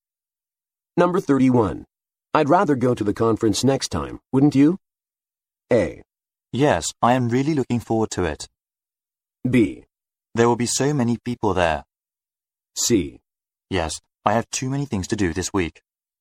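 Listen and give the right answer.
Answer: C: Yes, I have too many things to do this week.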